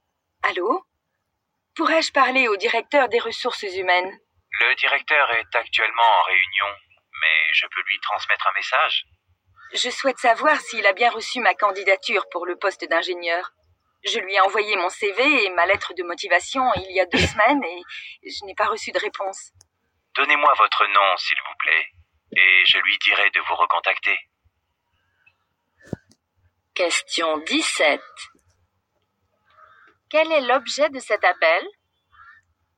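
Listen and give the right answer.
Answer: Savoir si sa candidature a bien été reçue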